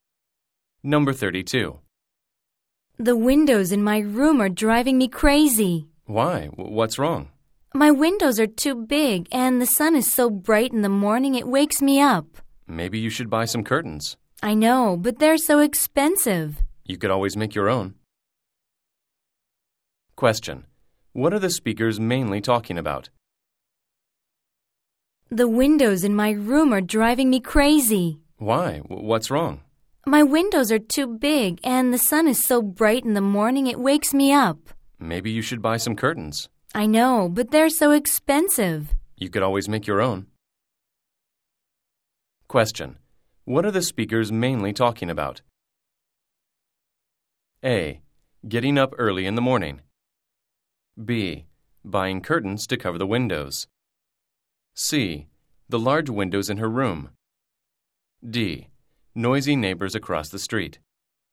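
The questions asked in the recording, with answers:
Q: What are the speakers mainly talking about?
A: C: The large windows in her room.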